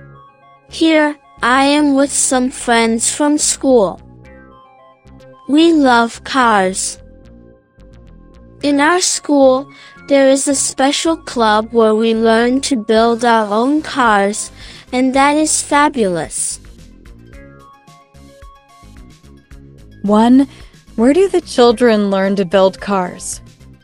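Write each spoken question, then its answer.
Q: Where do the children learn to build cars?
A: In a special club at their school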